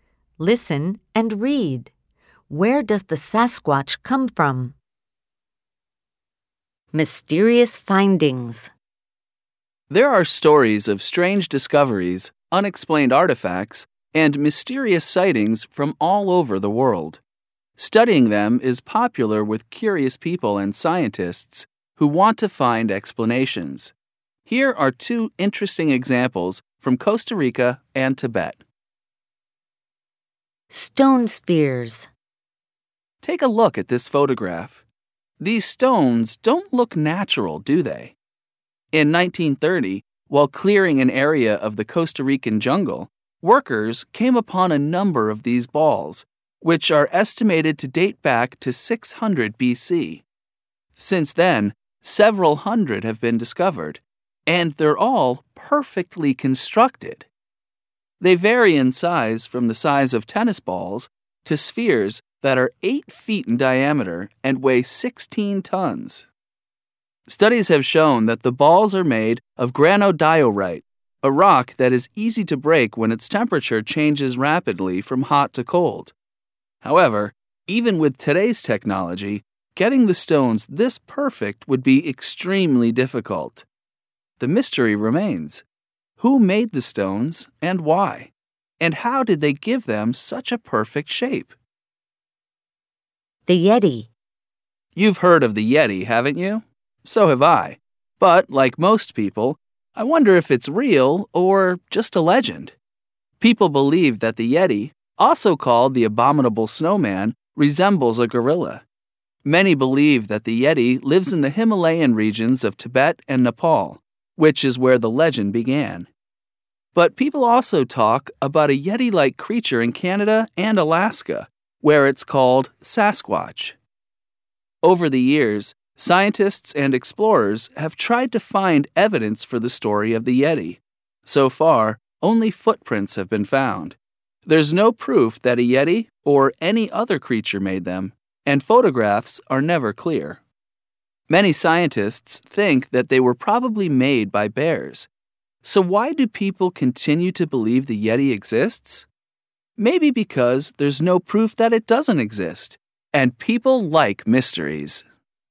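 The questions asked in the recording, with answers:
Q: Where does the Sasquatch come from?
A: Canada and Alaska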